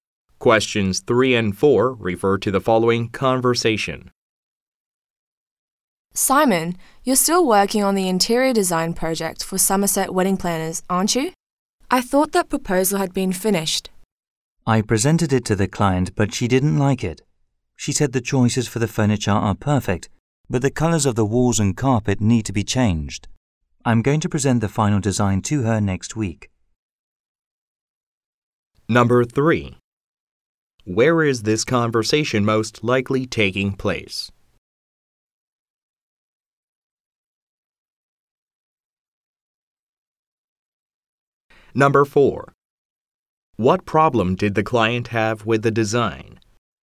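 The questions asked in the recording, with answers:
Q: What problem did the client have with the design?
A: She didn't like the colours of the walls and carpet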